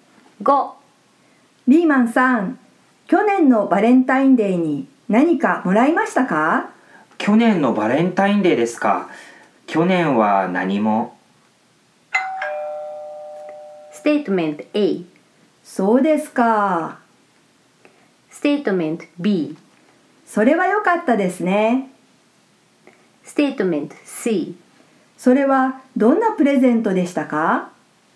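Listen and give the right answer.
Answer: A: そうですか。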